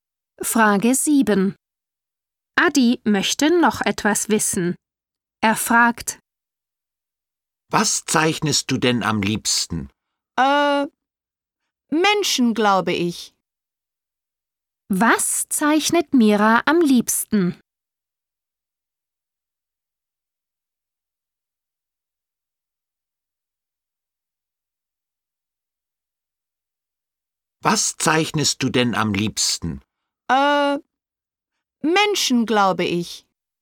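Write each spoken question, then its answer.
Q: Was zeichnet Mira am liebsten?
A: Menschen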